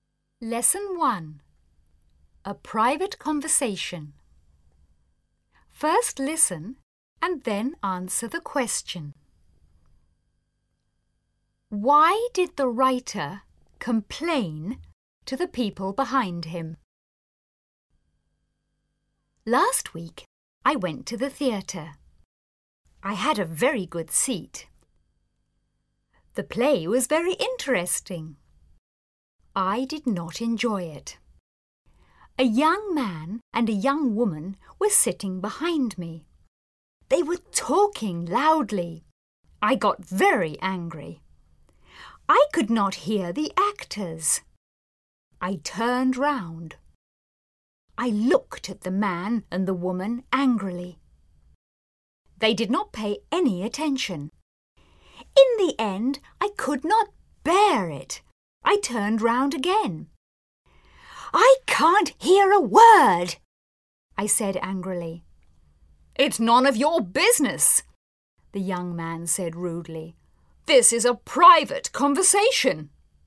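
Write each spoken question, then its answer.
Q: Why did the writer complain to the people behind him?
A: Because they were talking loudly and he could not hear the actors.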